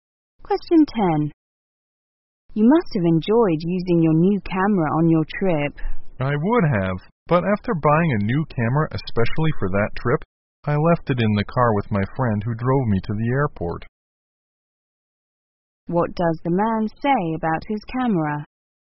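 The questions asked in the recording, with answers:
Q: What does the man say about his camera?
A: He left it in his friend's car and couldn't use it on the trip.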